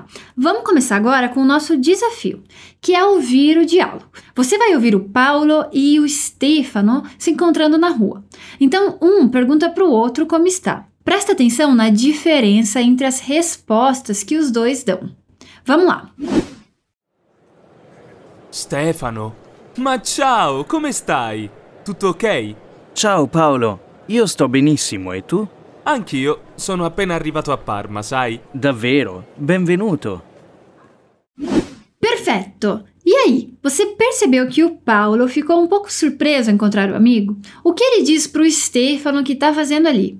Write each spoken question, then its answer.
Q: O que ele diz para o Stefano que está fazendo ali?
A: E aí ele diz que acabou de chegar em Parma, que é uma cidade no norte da Itália.